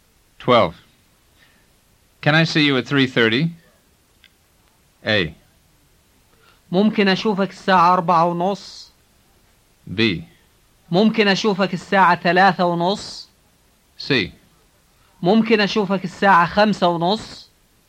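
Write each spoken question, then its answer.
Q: Can I see you at 3:30?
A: B: ممكن أشوفك الساعة 3:30.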